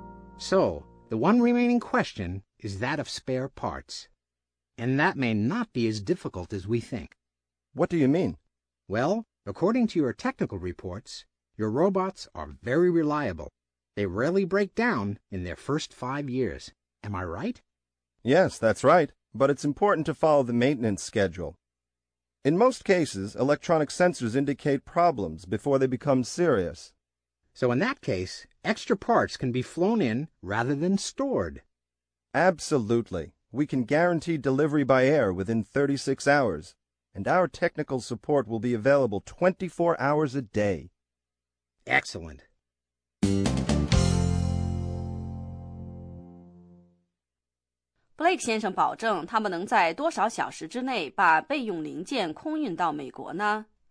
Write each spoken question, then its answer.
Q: Blake 先生保证他们能在多少小时之内把备用零件空运到美国呢?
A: 这句话的意思是,我们保证在36小时内将零件空运过来。